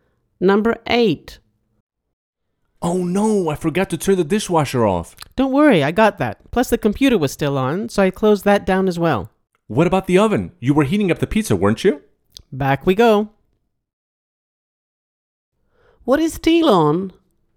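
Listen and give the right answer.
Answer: The oven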